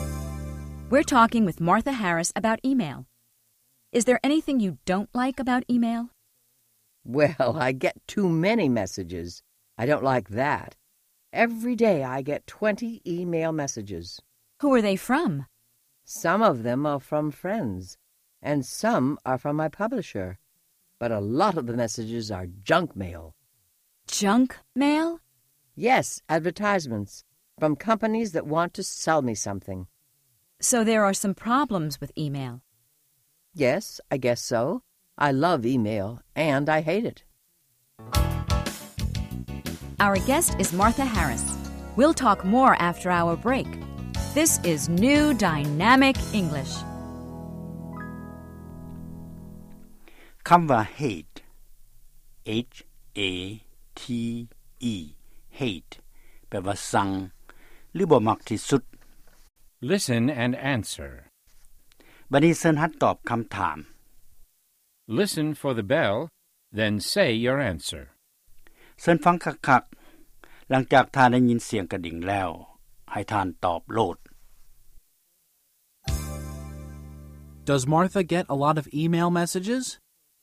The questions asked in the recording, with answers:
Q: Does Martha get a lot of email messages?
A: Yes, she gets too many messages.